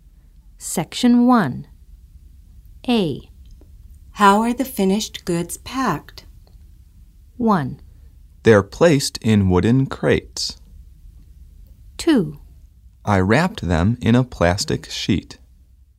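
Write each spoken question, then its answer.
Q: How are the finished goods packed?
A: 1: They're placed in wooden crates.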